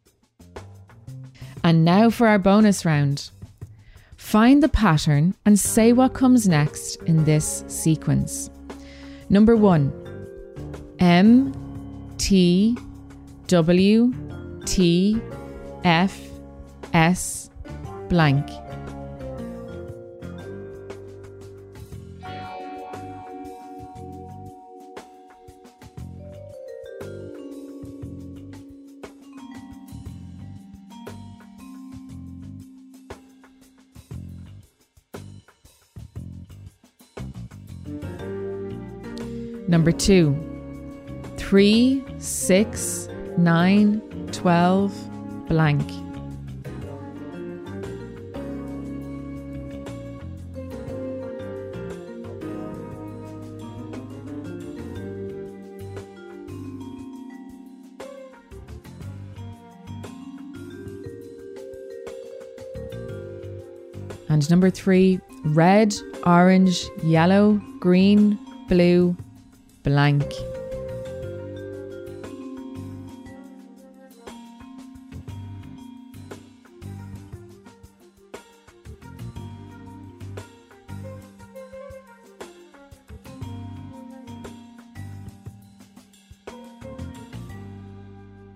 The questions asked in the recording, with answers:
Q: 3, 6, 9, 12, blank.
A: The answer is 15.